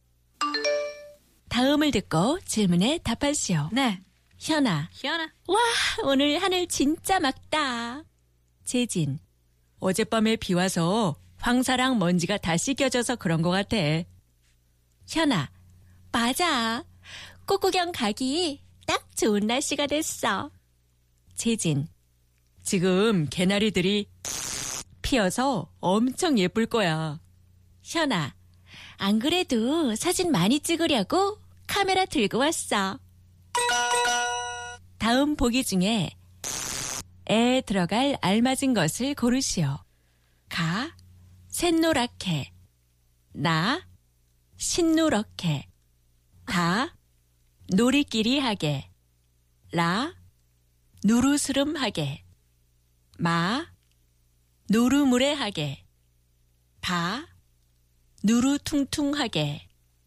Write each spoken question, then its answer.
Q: 다음 보기 중에 에 들어갈 알맞은 것을 고르시오.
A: 지금 개나리들이 새노랗게 피어서 엄청 예쁠 거야.